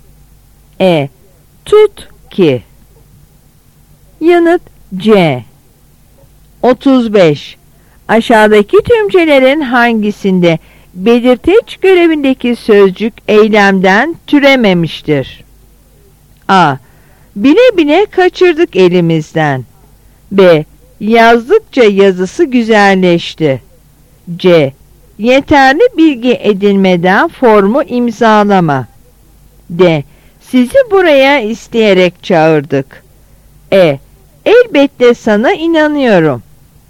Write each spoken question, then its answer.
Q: Aşağıdaki tümcelerin hangisinde belirteç görevindeki sözcük eylemden türememiştir?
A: Yanıt E.